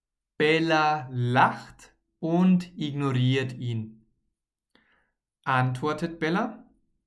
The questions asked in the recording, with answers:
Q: Antwortet Bella?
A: Nein, sie antwortet nicht.